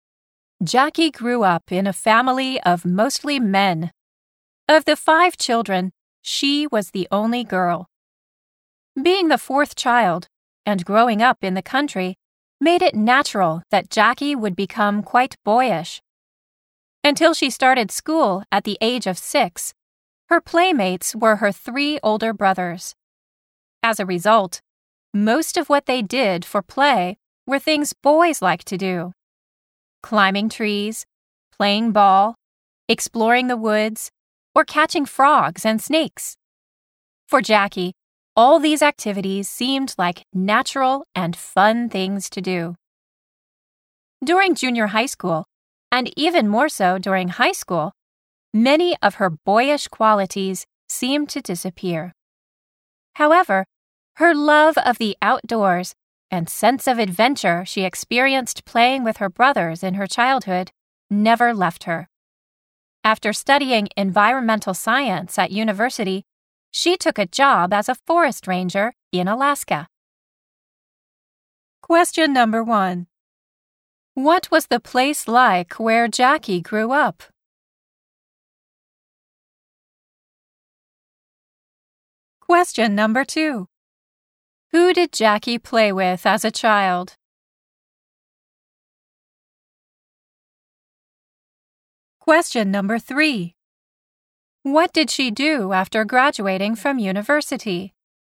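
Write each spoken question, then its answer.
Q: What was the place like where Jackie grew up?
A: It was in the country.

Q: Who did Jackie play with as a child?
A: Her three older brothers.

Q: What did she do after graduating from university?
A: She took a job as a forest ranger in Alaska.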